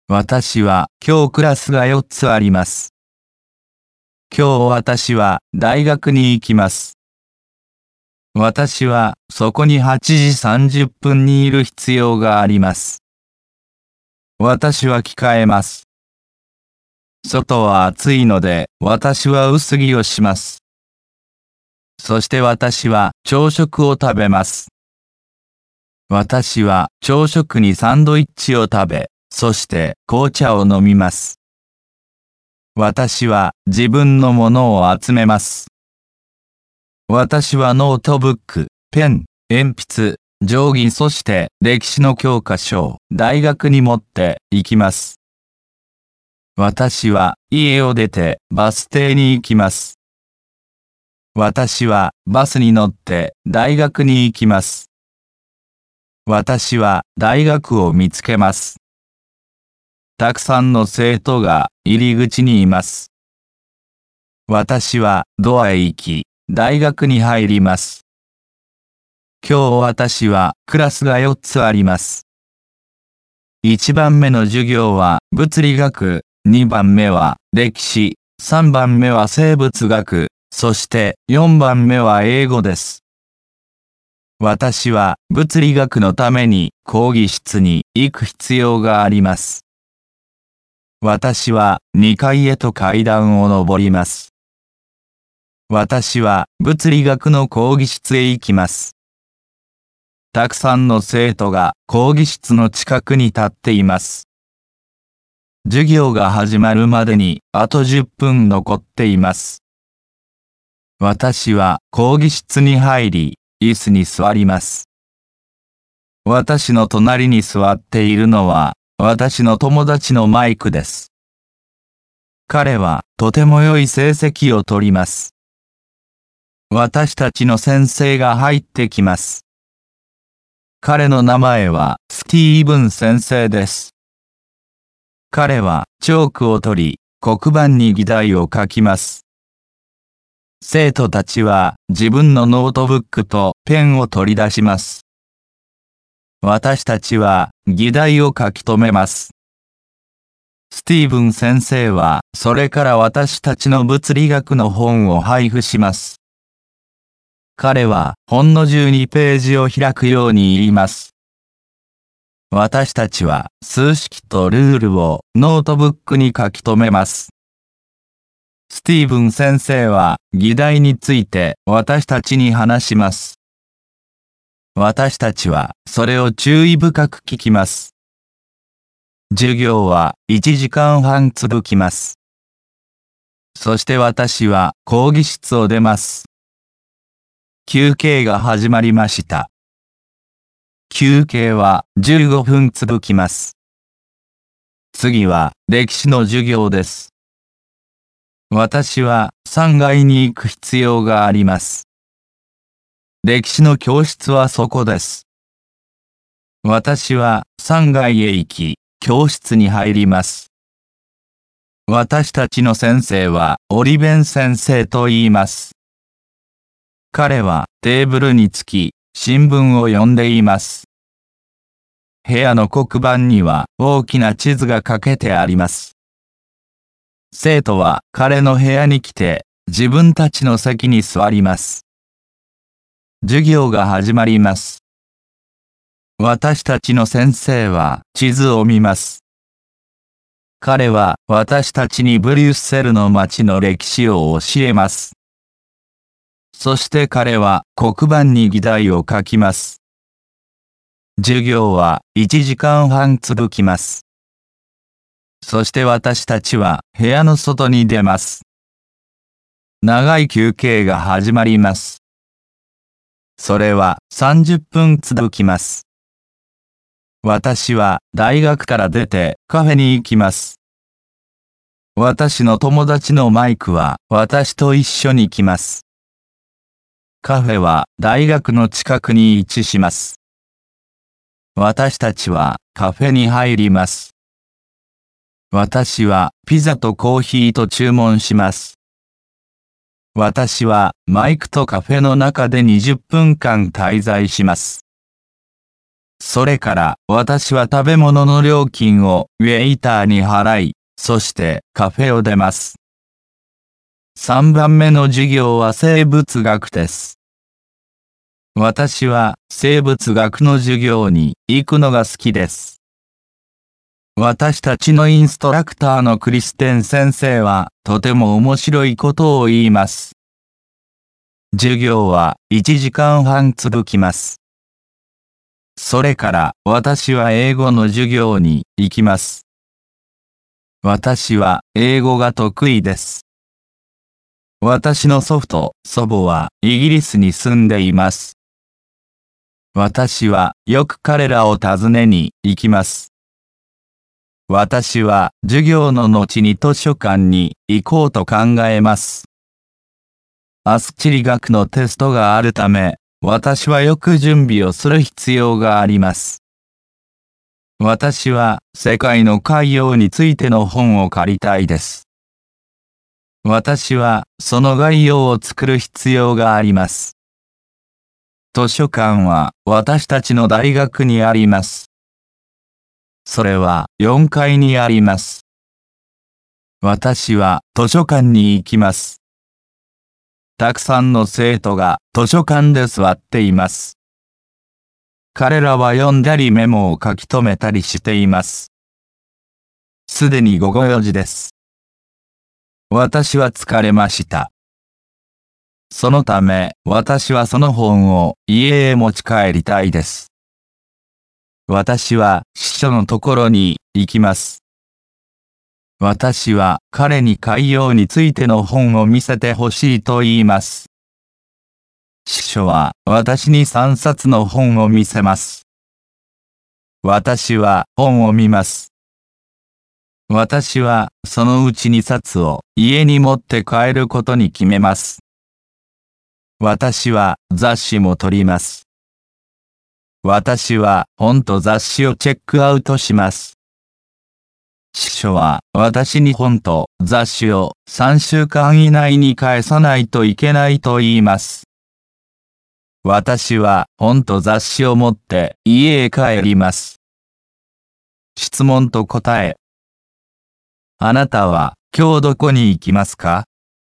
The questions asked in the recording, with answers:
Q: あなたは今日どこに行きますか?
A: 今日私は大学に行きます。